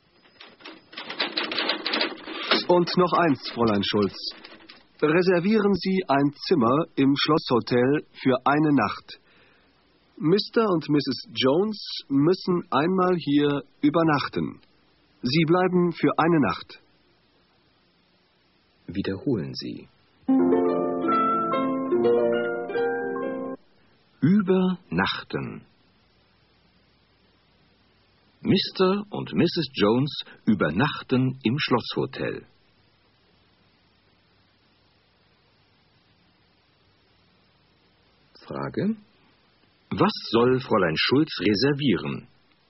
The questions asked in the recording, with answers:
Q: Frage: Was soll Fräulein Schulz reservieren?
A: Sie soll ein Zimmer im Schlosshotel reservieren.